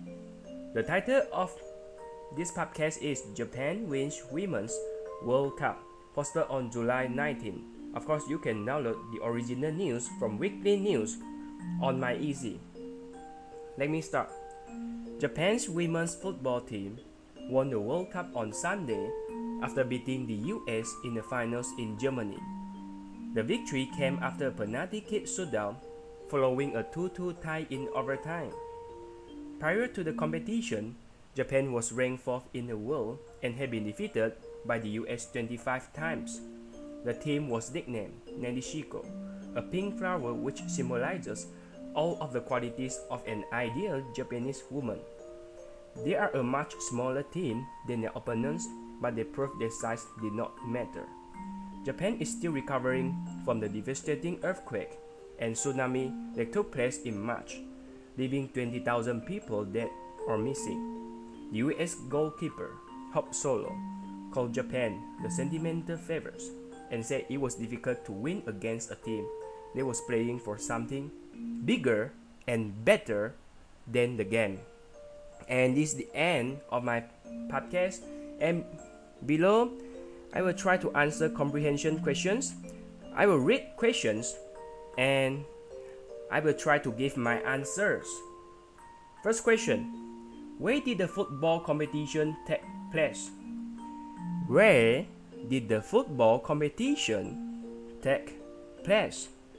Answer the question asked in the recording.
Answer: The football competition took place in Germany.